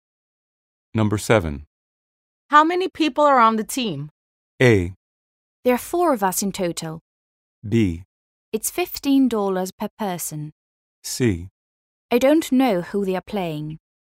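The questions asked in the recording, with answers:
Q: How many people are on the team?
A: A: There are 4 of us in total.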